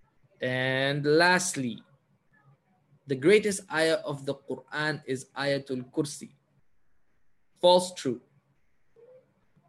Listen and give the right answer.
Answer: true.